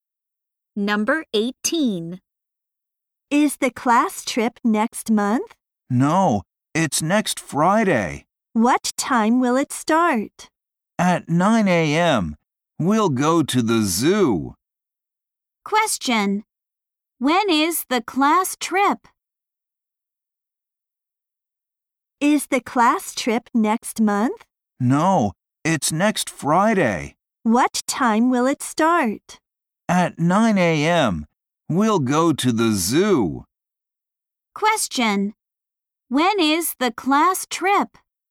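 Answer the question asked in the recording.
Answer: Next Friday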